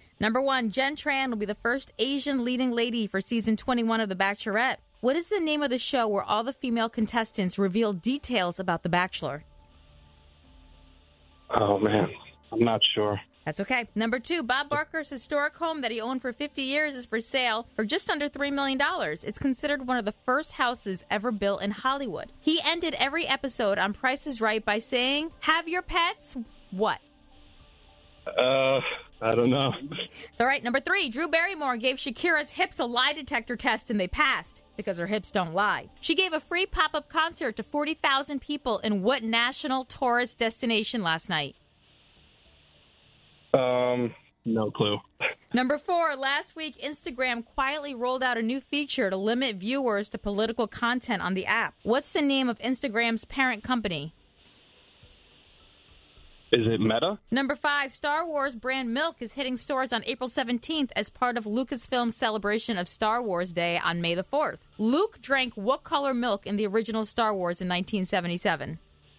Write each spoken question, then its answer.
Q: What's the name of Instagram's parent company?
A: Meta is correct.